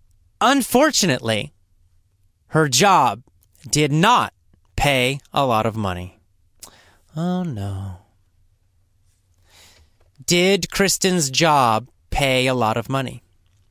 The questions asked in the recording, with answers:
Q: Did Kristen's job pay a lot of money?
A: No, it didn't.